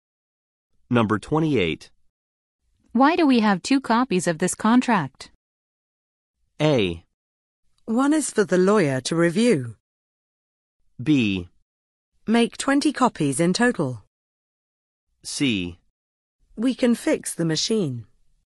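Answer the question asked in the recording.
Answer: A: One is for the lawyer to review.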